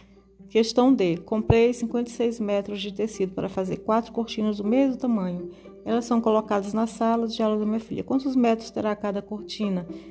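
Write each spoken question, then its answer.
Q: Quantos metros terá cada cortina?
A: 14 metros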